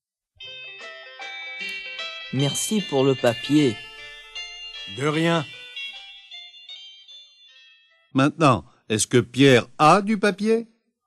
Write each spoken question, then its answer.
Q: Maintenant, est-ce que Pierre a du papier?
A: Oui, il a du papier.